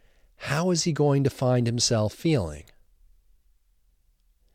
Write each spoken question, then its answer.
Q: How is he going to find himself feeling?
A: He's going to find himself feeling stressed.